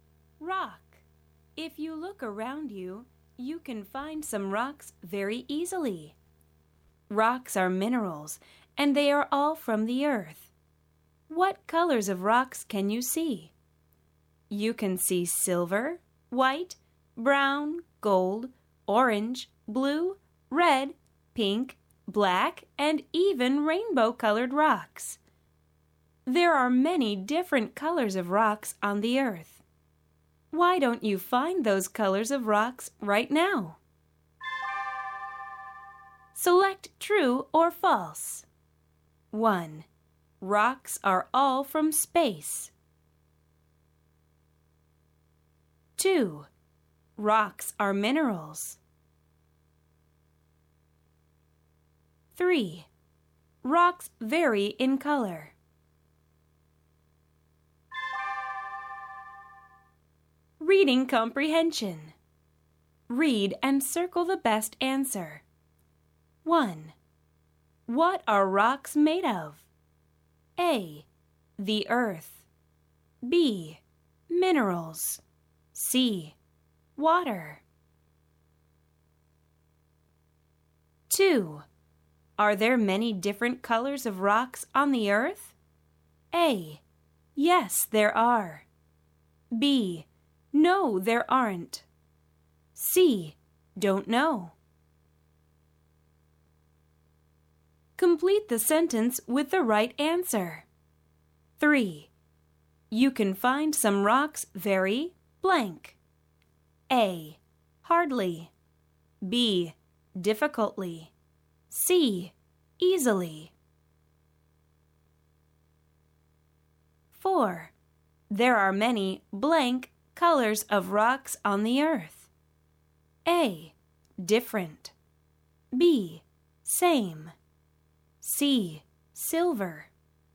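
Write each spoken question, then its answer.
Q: Rocks are all from space.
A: False

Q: Rocks are minerals.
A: True

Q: Rocks vary in color.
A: True

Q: Are there many different colors of rocks on the earth?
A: A: Yes, there are.

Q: You can find some rocks very blank.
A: C: Easily.

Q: There are many blank colors of rocks on the earth.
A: A: Different.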